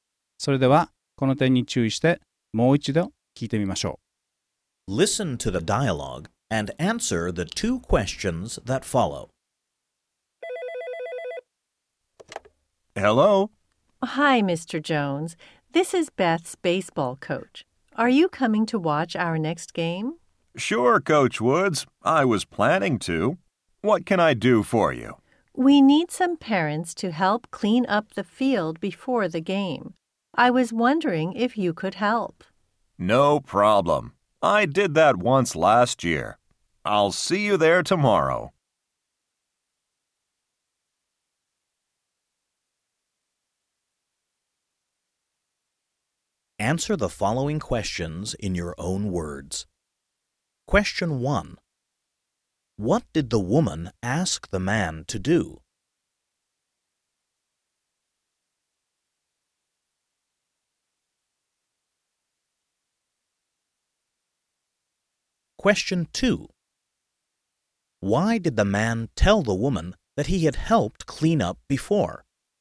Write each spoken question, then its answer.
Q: What did the woman ask the man to do?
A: She asked him to help clean up the field before the game.